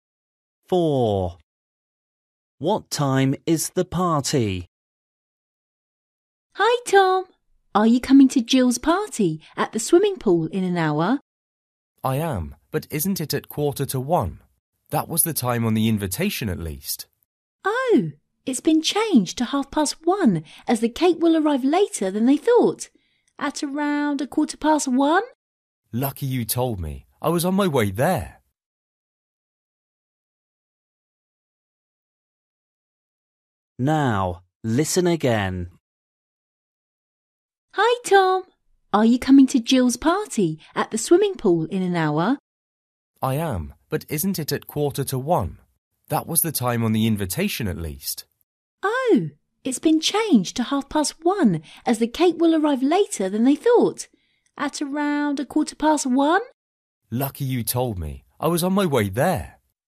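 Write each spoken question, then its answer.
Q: What time is the party?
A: 1:30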